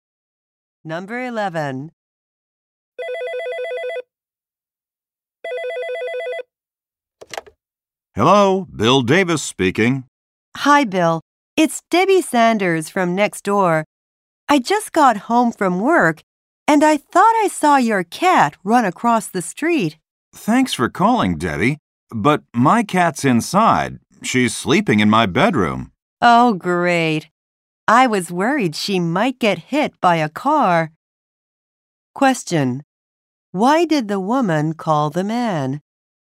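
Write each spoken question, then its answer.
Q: Why did the woman call the man?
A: She thought she saw his cat run across the street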